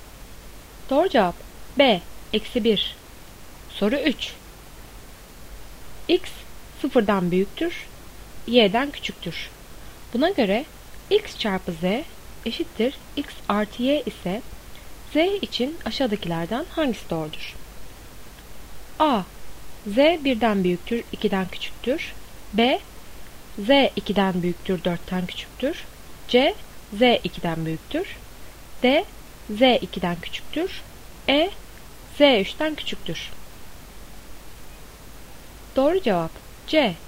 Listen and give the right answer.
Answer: Doğru cevap C. Z 2'den büyüktür.